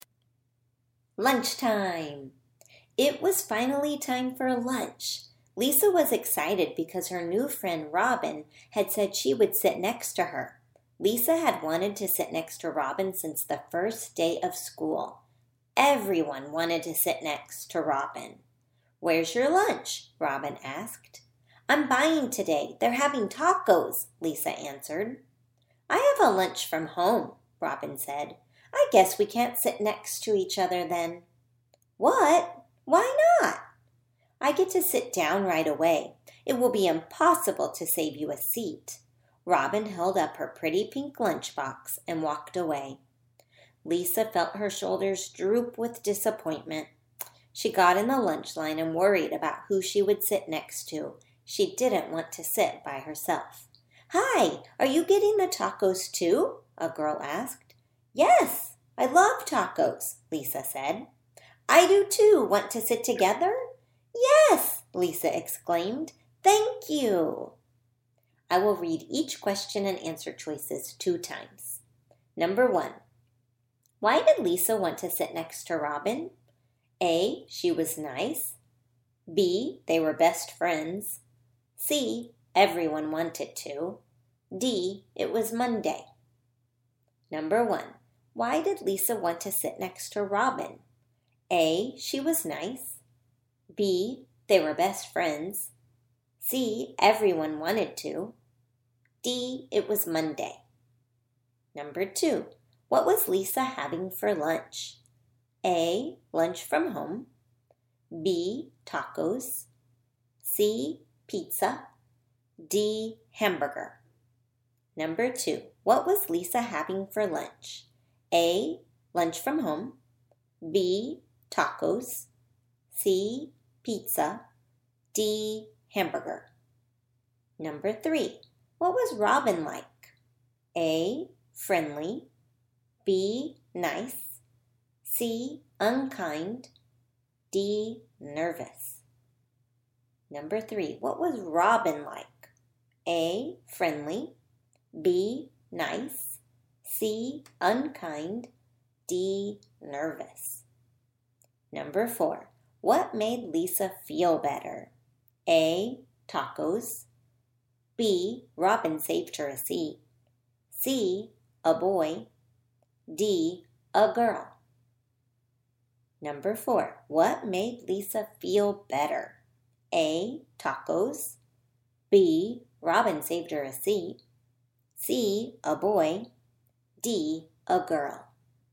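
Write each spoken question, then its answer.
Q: why did Lisa want to sit next to Robin?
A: C: everyone wanted to

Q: what was Lisa having for lunch?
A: B: tacos

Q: what was Robin like?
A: C: unkind

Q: what made Lisa feel better?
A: D: a girl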